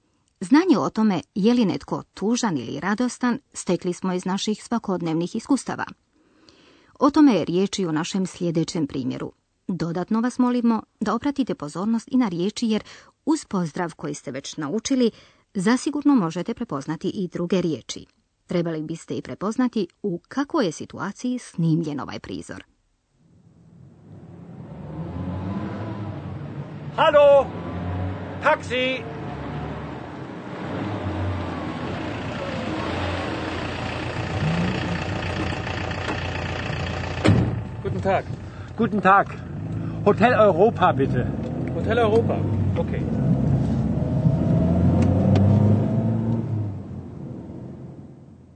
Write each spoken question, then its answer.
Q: Trebali biste i prepoznati u kakvoj je situaciji snimljen ovaj prizor.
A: Naše je sjećanje na površinu izbacilo situaciju vožnja taksijem